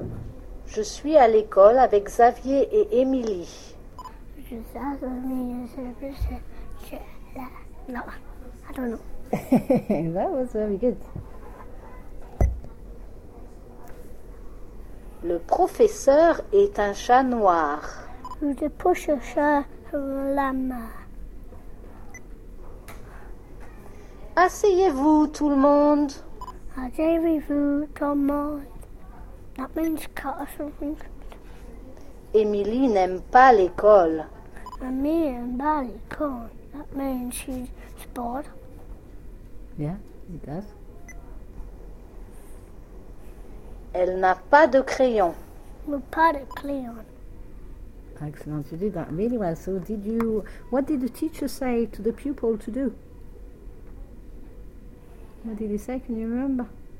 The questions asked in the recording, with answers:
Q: So did you, what did the teacher say to the pupil to do?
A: He said, asseyez-vous tout le monde.